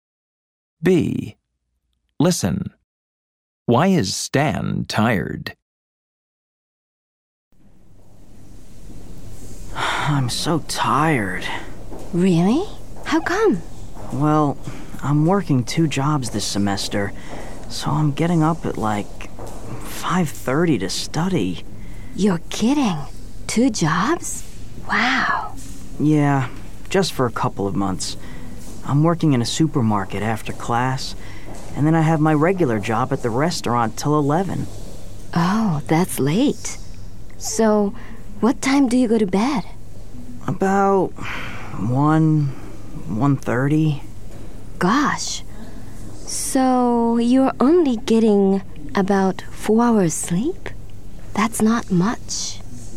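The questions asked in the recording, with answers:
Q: Why is Stan tired?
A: He's working two jobs, so he gets up at 5:30 and only sleeps about 4 hours.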